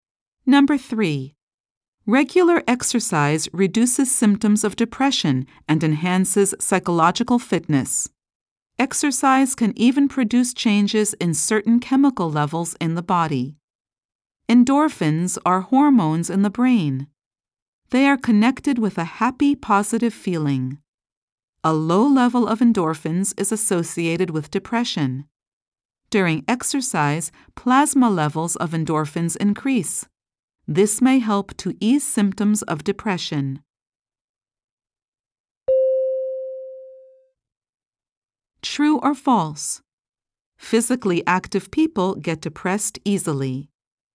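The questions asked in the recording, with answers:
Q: True or false? Physically active people get depressed easily.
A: False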